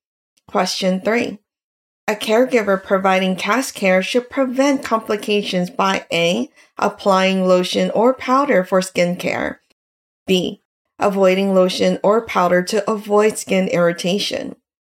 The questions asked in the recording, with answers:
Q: A caregiver providing cast care should prevent complications by A, applying lotion or powder for skin care, B, avoiding lotion or powder to avoid skin irritation.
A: The correct answer is B, avoiding lotion or powder to avoid skin irritation.